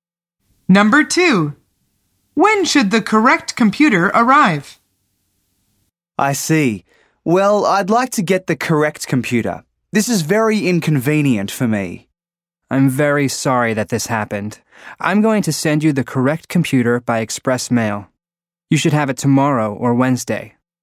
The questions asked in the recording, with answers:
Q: When should the correct computer arrive?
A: The answer is Tuesday or Wednesday.